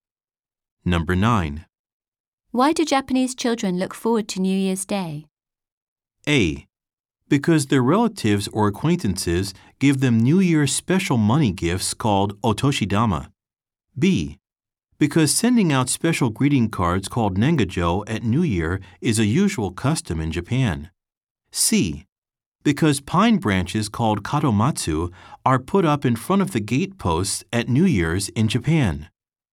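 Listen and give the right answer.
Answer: A: Because their relatives or acquaintances give them New Year's special money gifts called otoshidama.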